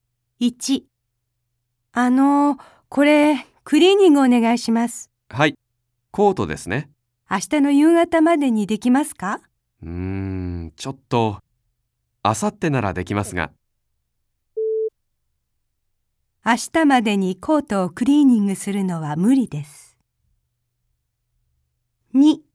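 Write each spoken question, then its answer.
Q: 明日までにコートをクリーニングするのは無理です。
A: 正しい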